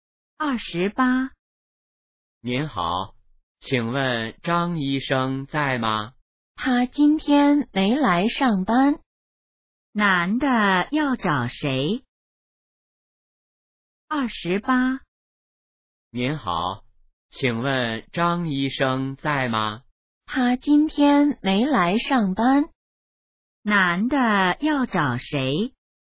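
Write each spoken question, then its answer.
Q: 男的要找谁?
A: 张医生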